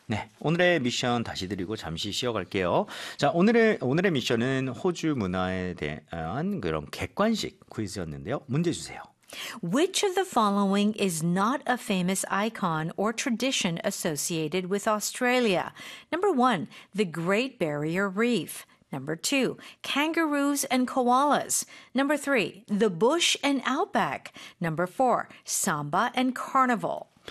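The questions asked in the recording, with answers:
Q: Which of the following is not a famous icon or tradition associated with Australia?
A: 4: samba and carnival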